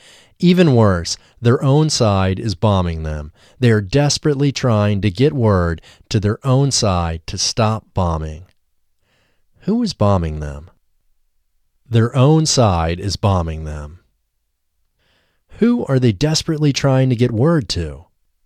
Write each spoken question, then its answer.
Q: Who are they desperately trying to get word to?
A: They are desperately trying to get word to their own side.